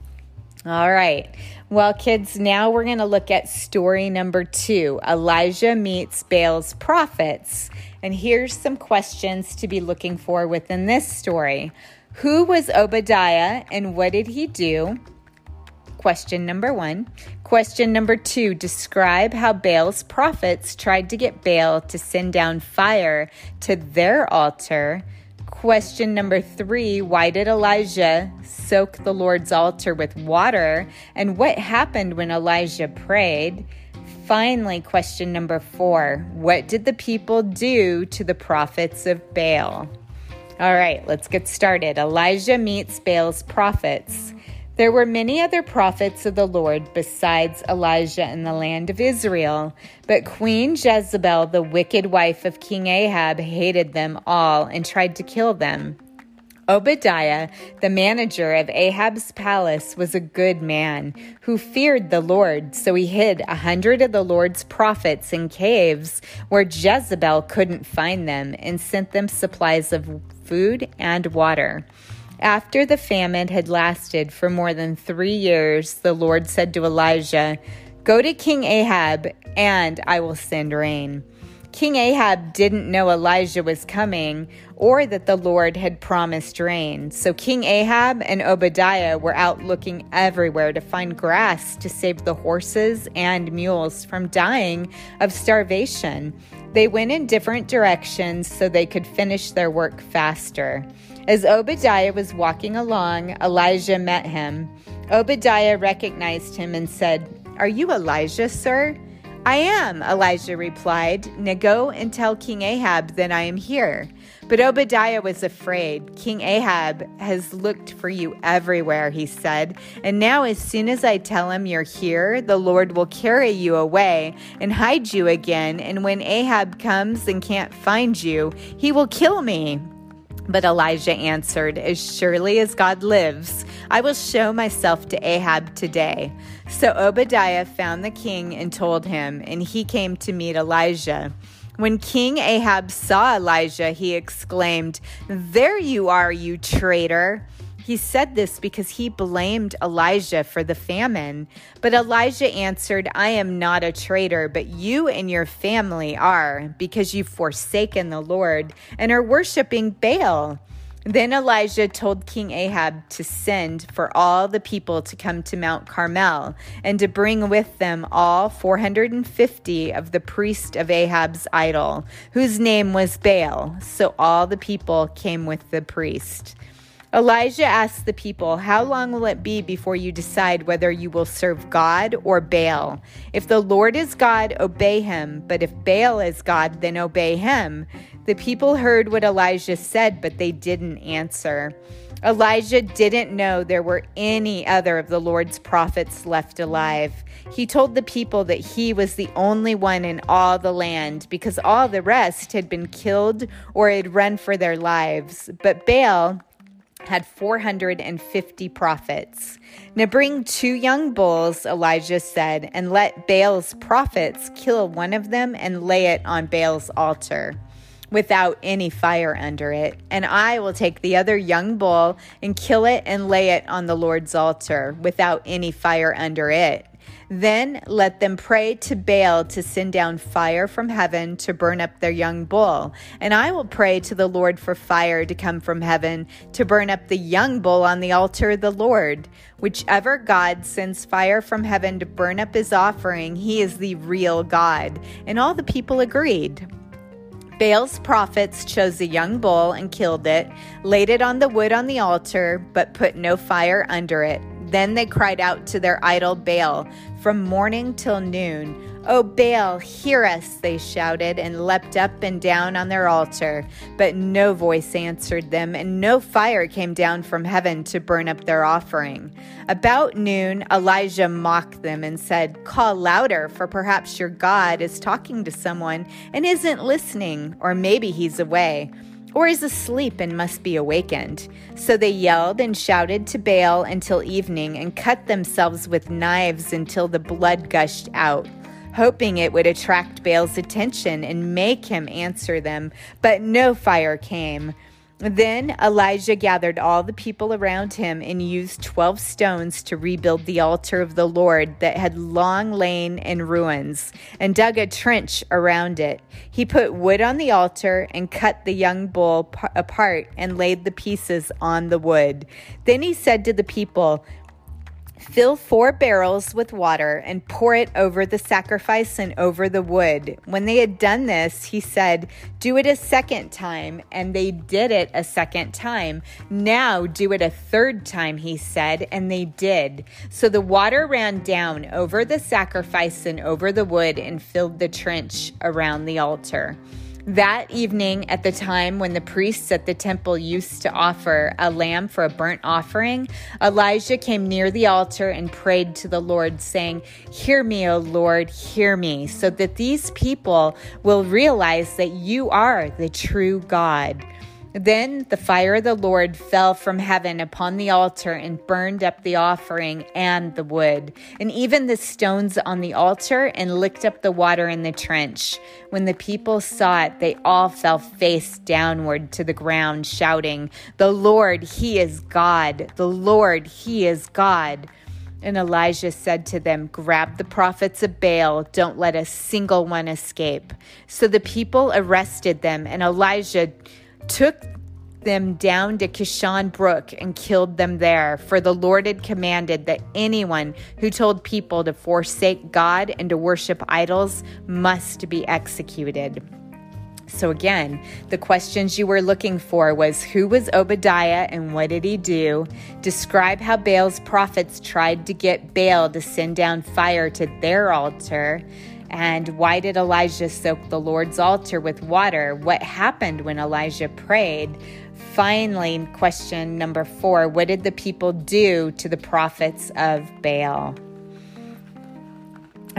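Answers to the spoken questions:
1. The manager of Ahab's palace; he hid 100 of the Lord's prophets in caves and sent them food and water
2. They shouted to Baal from morning till evening, leapt on the altar and cut themselves with knives
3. Fire fell from heaven and burned up the offering, the wood, the stones and the water
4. They arrested them, and Elijah killed them at Kishon Brook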